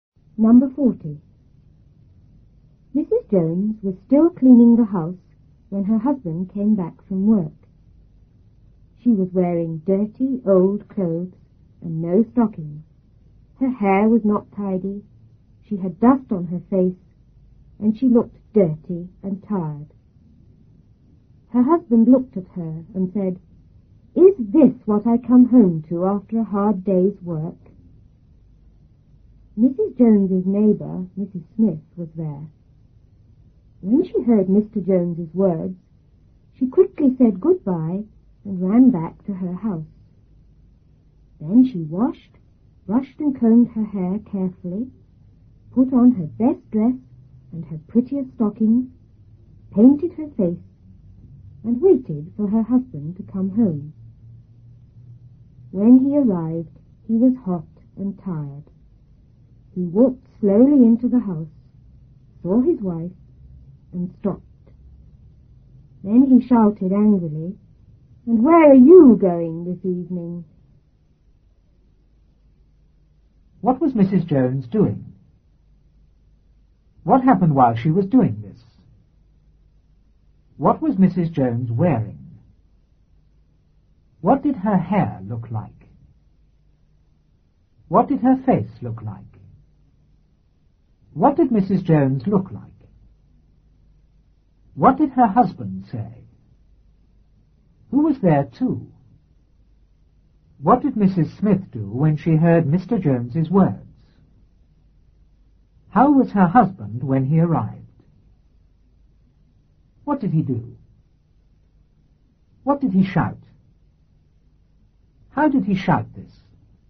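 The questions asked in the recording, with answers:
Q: What was Mrs. Jones doing?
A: Cleaning the house

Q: What happened while she was doing this?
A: Her husband came back from work

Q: What was Mrs. Jones wearing?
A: Dirty old clothes and no stockings

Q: What did her hair look like?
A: It was not tidy

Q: What did her face look like?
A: It had dust on it

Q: What did Mrs. Jones look like?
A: Dirty and tired

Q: What did her husband say?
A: Is this what I come home to after a hard day's work?

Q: Who was there too?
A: Mrs. Smith, the neighbor

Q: What did Mrs. Smith do when she heard Mr. Jones's words?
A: She quickly said goodbye and ran back to her house

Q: How was her husband when he arrived?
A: Hot and tired

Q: What did he do?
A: He walked slowly into the house, saw his wife, and stopped

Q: What did he shout?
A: And where are you going this evening?

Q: How did he shout this?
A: Angrily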